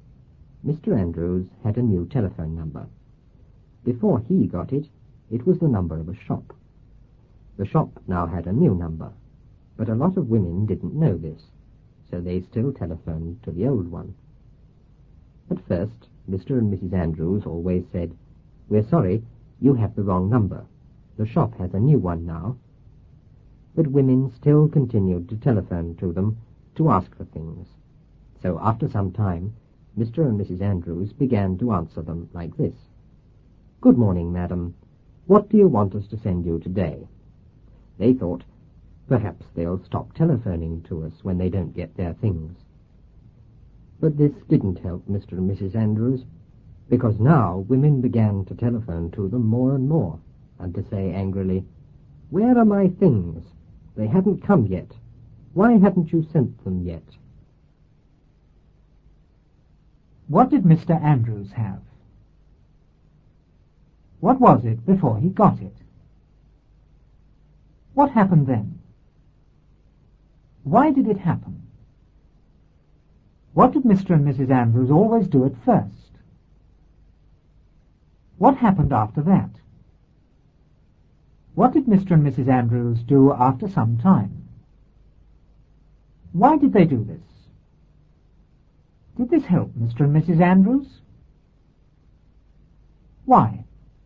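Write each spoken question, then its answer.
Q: What did Mr. Andrews have?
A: A new telephone number

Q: What was it before he got it?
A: The number of a shop

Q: What happened then? Why did it happen?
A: Women still telephoned the old number because they didn't know the shop had a new one

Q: What did Mr. and Mrs. Andrews always do at first?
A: They said, "We're sorry, you have the wrong number. The shop has a new one now."

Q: What happened after that?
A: Women still continued to telephone them to ask for things

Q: What did Mr. and Mrs. Andrews do after some time?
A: They answered, "Good morning, madam. What do you want us to send you today?"

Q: Why did they do this? Did this help Mr. and Mrs. Andrews? Why?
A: They thought the women would stop calling when they didn't get their things; it didn't help, because women called more and more, angrily asking where their things were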